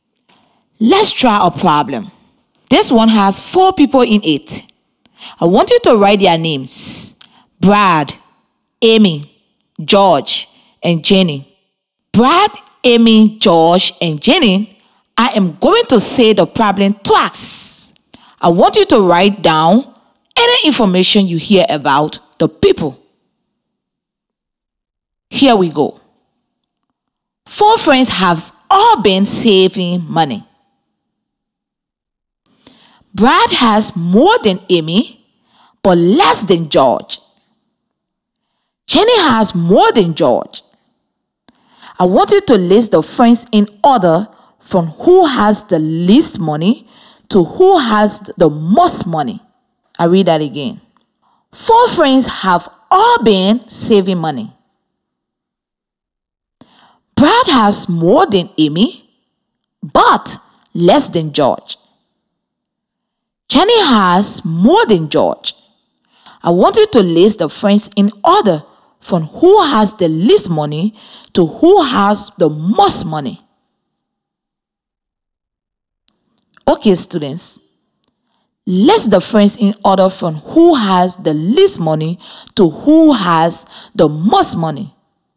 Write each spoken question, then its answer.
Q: List the friends in order from who has the least money to who has the most money.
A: I know that Amy has the least money, followed by Brad, then George, then Jenny has the most money.